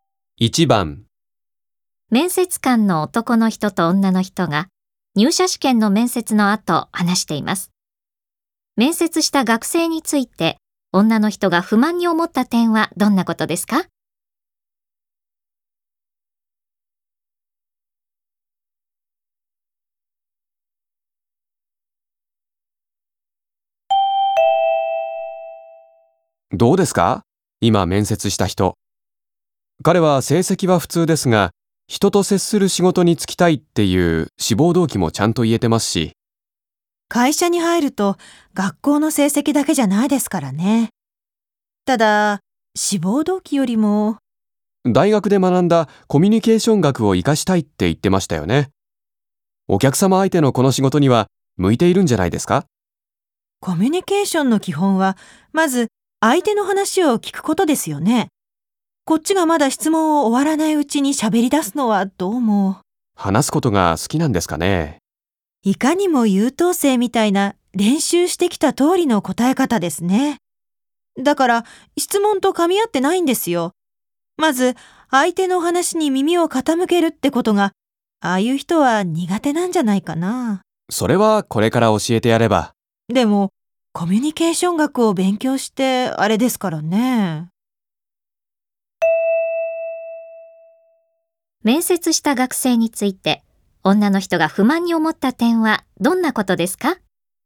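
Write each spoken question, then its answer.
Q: 面接した学生について、女の人が不満に思った点はどんなことですか?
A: 相手の話を最後まで聞かず、質問が終わらないうちに話し出すこと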